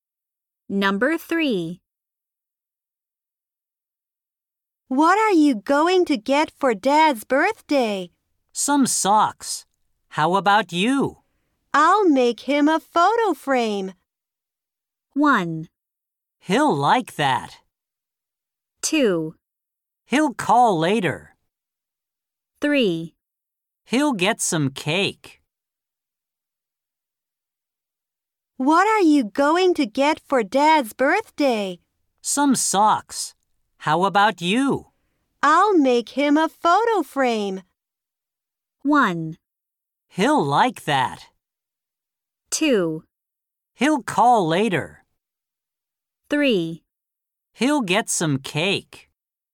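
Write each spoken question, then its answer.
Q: I'll make him a photo frame.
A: 1: He'll like that.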